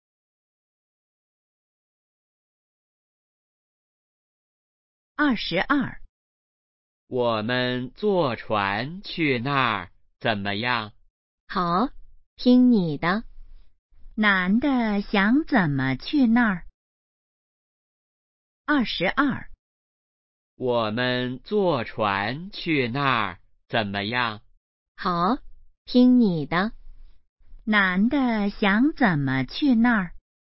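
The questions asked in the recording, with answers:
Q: 男的想怎么去那儿?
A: 坐船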